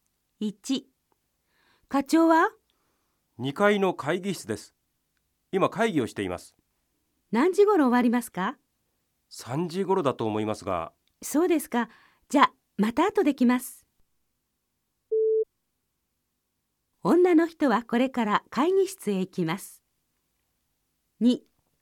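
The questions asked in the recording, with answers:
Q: 女の人はこれから会議室へ行きます。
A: いいえ(×)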